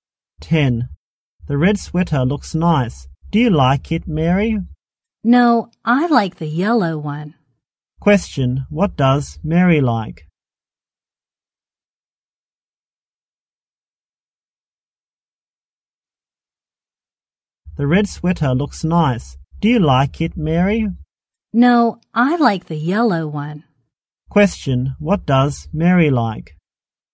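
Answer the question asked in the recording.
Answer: The yellow sweater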